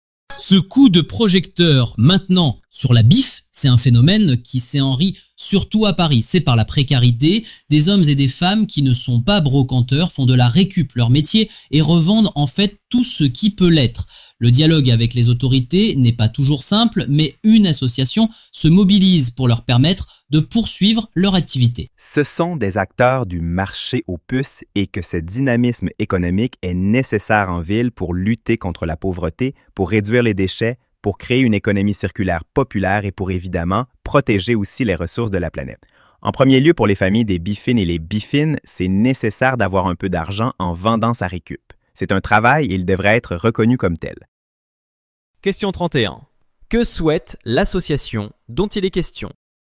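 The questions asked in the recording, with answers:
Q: Que souhaite l'association dont il est question?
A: Permettre aux biffins de poursuivre leur activité et la faire reconnaître comme un vrai travail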